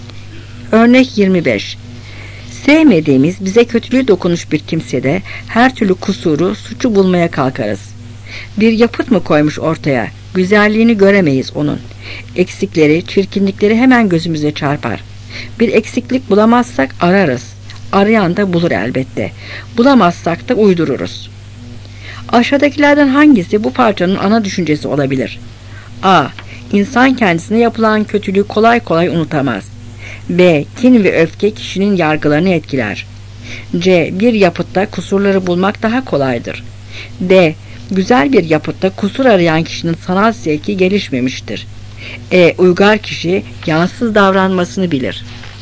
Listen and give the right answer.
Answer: Cevap B.